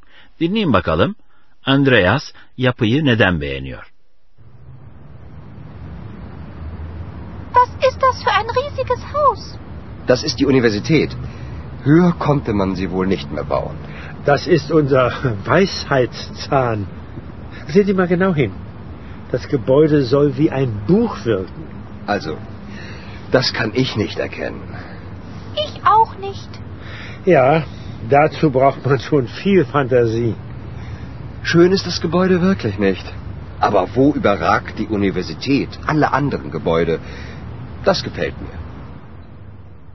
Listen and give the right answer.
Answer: Andreas üniversite binasını bütün öteki binalara hakim olduğu için beğeniyor.